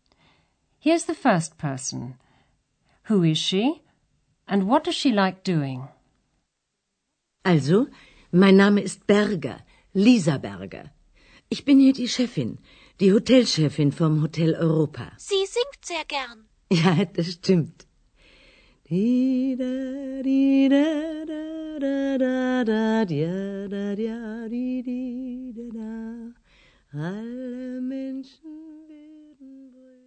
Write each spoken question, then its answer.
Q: Who is she?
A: That was Frau Berger, the manageress of the Hotel Europa.

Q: And what does she like doing?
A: Frau Berger likes singing.